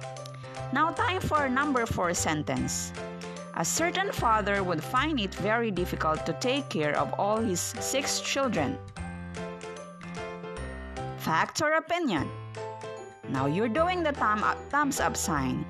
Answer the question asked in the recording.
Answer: Very good. It's an opinion.